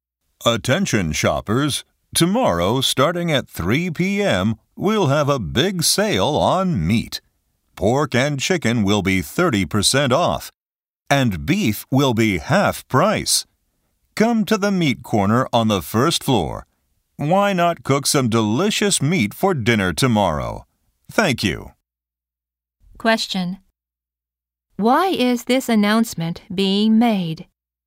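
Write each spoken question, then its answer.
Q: Why is this announcement being made?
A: To announce a big meat sale tomorrow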